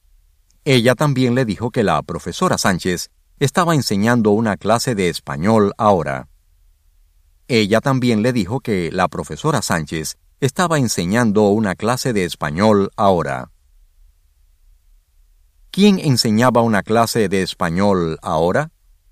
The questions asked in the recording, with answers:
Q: ¿Quién enseñaba una clase de español ahora?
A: La profesora Sánchez estaba enseñando una clase de español ahora.